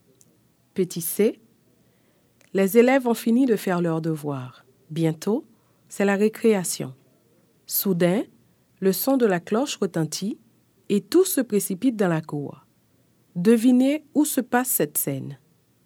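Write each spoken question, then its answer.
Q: Devinez où se passe cette scène.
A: à l'école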